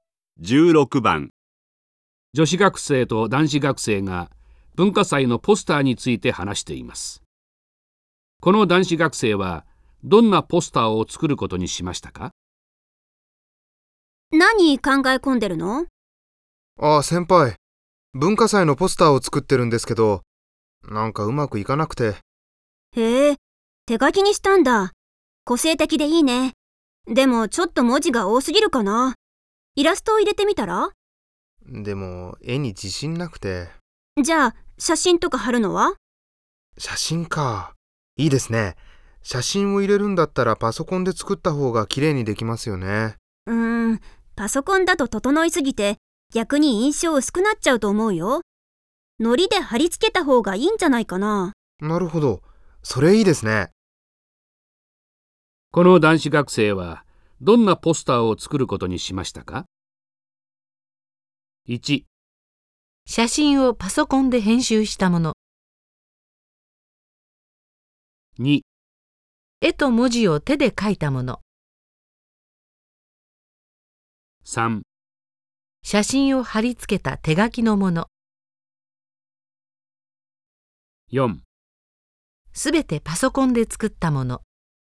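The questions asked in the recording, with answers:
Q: この男子学生はどんなポスターを作ることにしましたか?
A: 3: 写真を貼り付けた手書きのもの。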